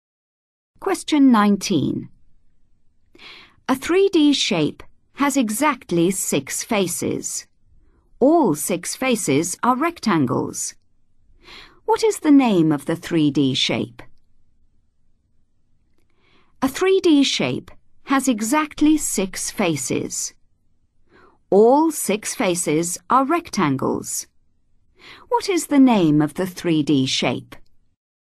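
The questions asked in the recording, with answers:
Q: What is the name of the 3D shape?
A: cuboid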